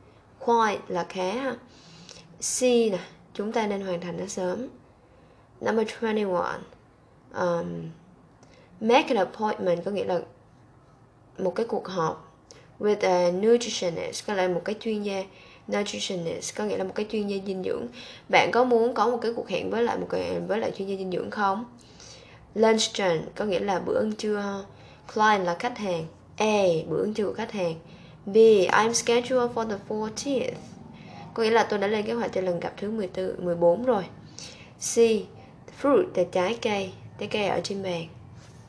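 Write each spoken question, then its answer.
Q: Bạn có muốn có một cái cuộc hẹn với lại chuyên gia dinh dưỡng không?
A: B: Tôi đã lên lịch cho ngày 14 rồi.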